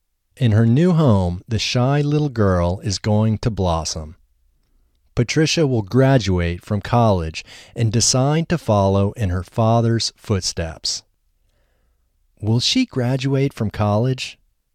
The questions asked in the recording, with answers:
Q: Will she graduate from college?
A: Yes, she will graduate from college.